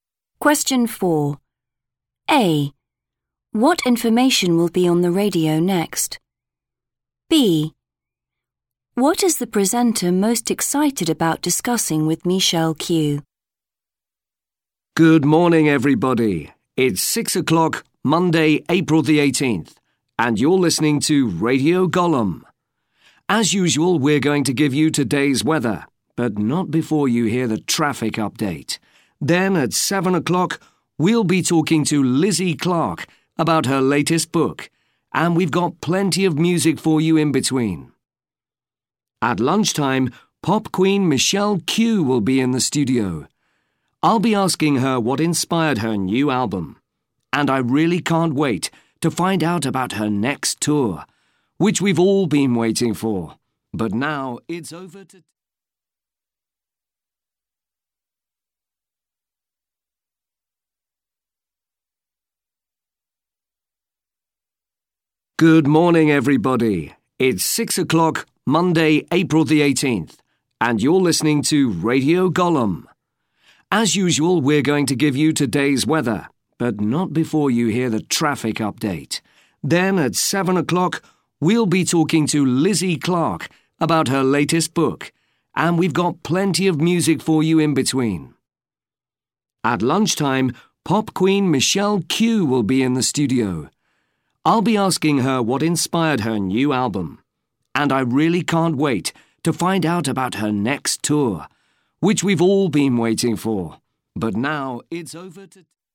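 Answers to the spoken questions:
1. Traffic update
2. Her next tour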